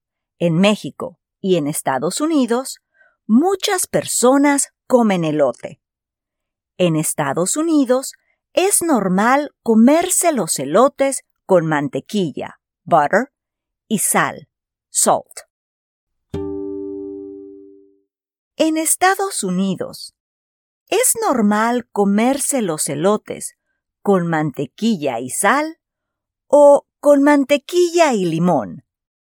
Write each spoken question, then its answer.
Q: En Estados Unidos, es normal comerse los elotes con mantequilla y sal o con mantequilla y limón.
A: Sí, en Estados Unidos es normal comerse los elotes con mantequilla y sal.